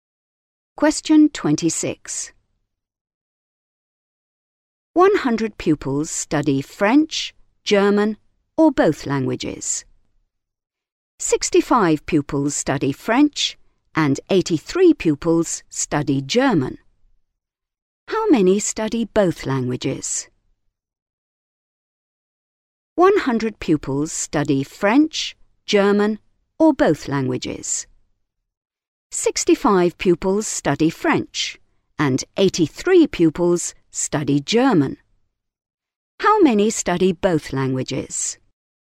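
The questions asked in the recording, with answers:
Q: How many study both languages?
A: 48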